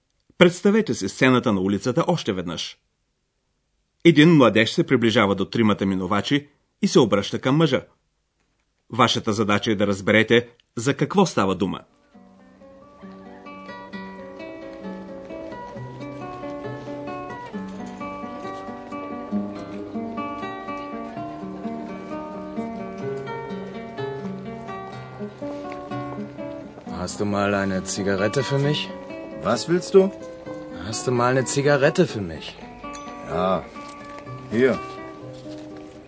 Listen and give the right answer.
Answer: младежът моли за една цигара.